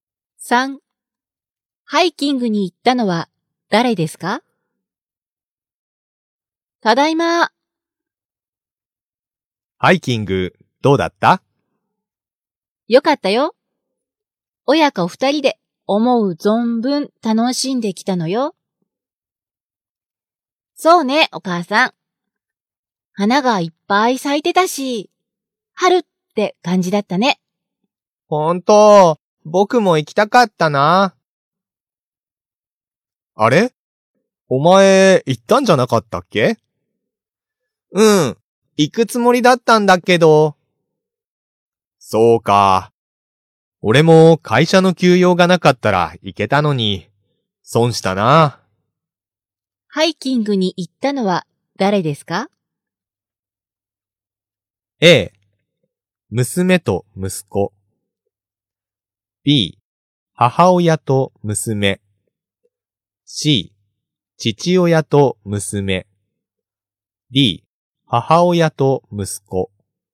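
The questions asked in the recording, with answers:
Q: ハイキングに行ったのは誰ですか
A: B: 母親と娘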